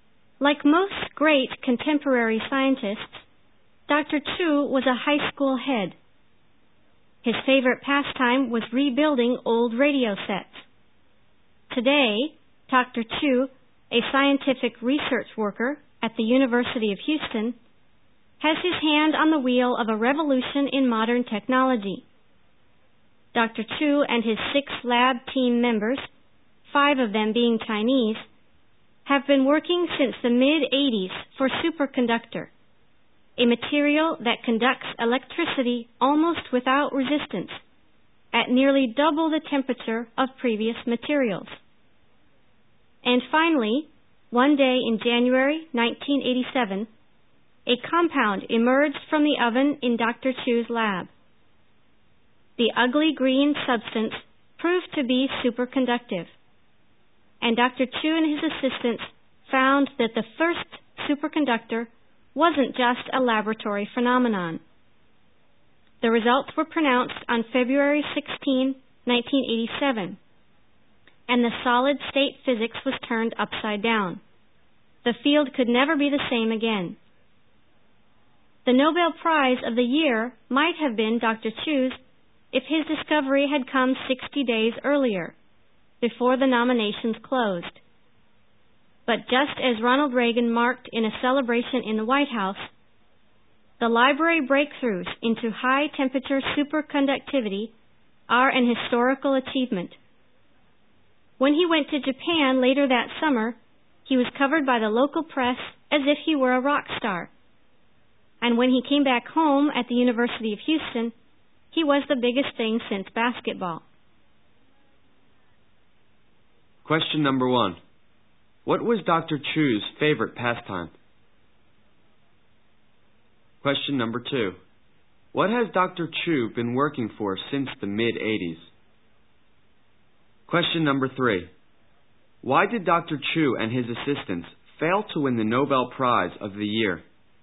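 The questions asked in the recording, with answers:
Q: What was Dr. Chu's favorite pastime?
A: Rebuilding old radio sets

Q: What has Dr. Chu been working for since the mid-80s?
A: A superconductor that works at nearly double the temperature of earlier materials

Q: Why did Dr. Chu and his assistants fail to win the Nobel Prize of the year?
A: Their discovery came after that year's nominations had closed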